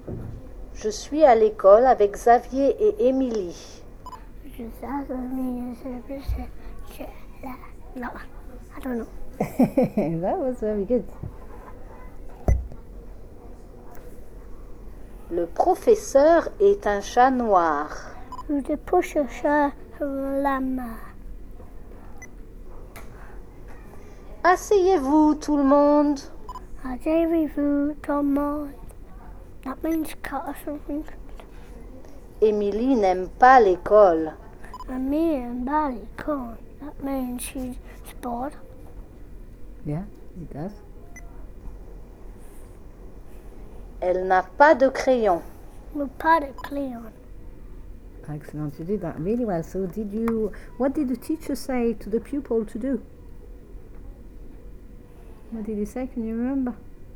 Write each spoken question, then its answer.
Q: So did you, what did the teacher say to the pupil to do?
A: He said, asseyez-vous tout le monde.